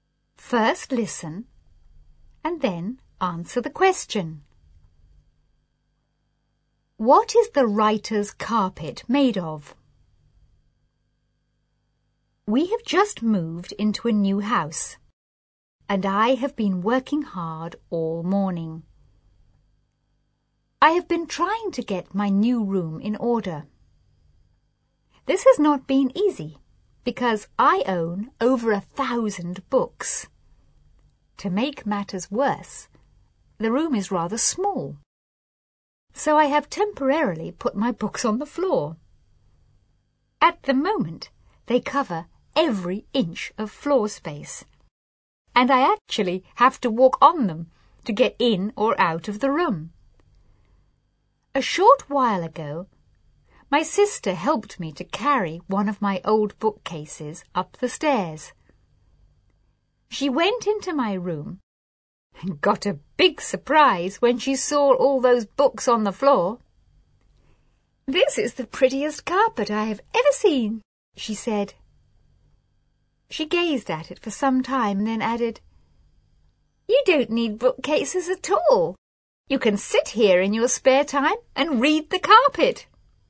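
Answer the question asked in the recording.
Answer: Books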